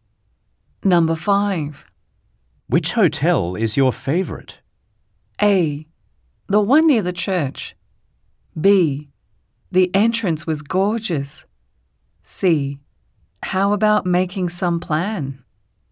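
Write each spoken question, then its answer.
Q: Which hotel is your favorite?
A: A: The one near the church.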